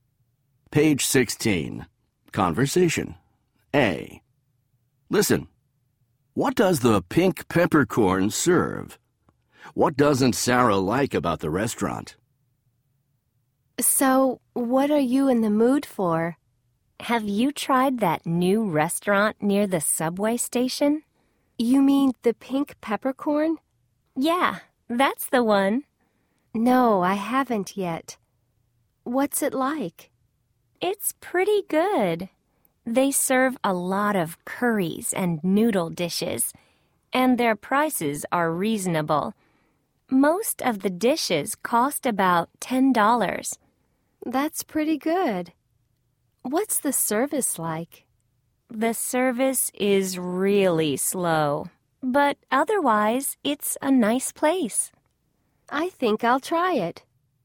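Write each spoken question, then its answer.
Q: What does the pink peppercorn serve?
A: Curries and noodle dishes

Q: What doesn't Sarah like about the restaurant?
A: The service is really slow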